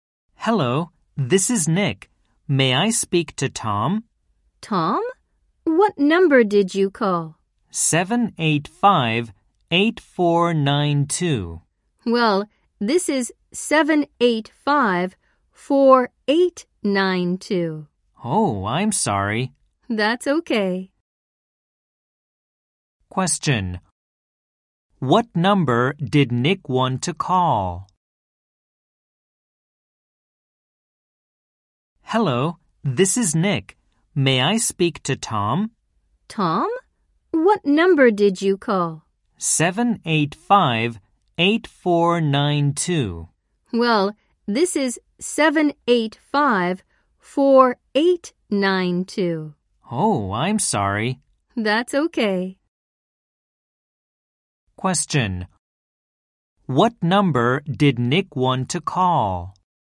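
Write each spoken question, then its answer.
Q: Question. What number did Nick want to call?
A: 785-8492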